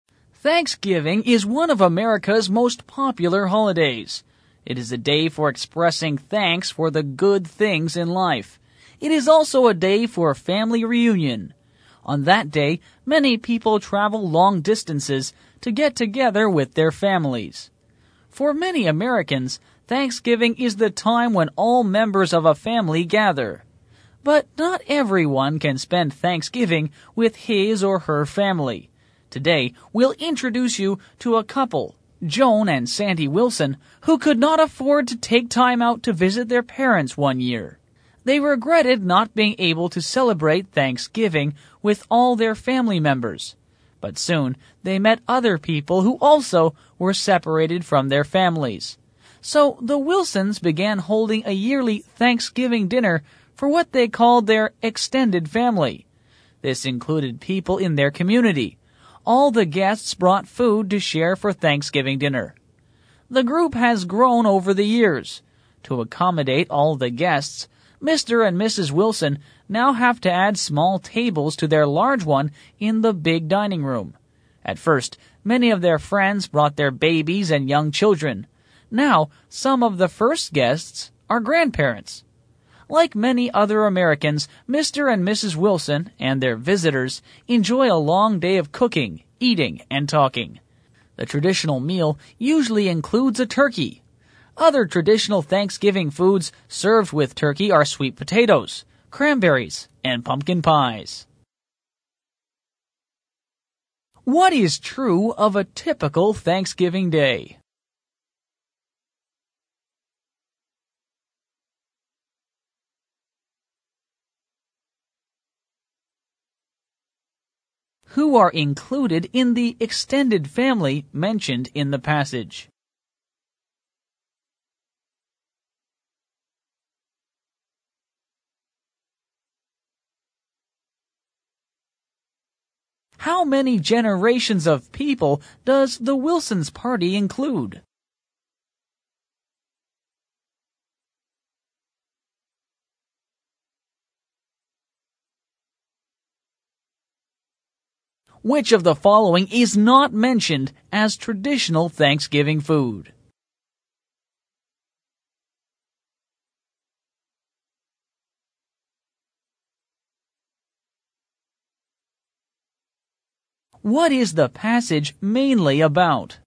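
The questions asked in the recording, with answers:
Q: Who are included in the extended family mentioned in the passage?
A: People in their community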